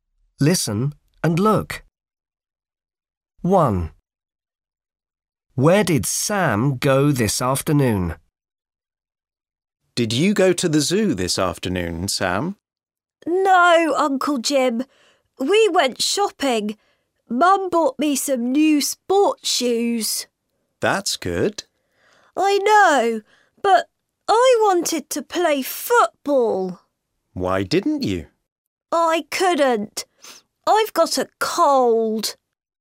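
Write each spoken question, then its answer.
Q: Where did Sam go this afternoon?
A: shopping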